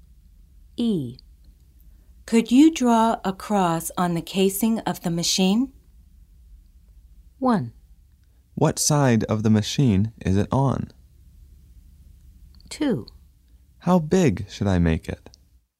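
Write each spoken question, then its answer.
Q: Could you draw a cross on the casing of the machine?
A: 2: How big should I make it?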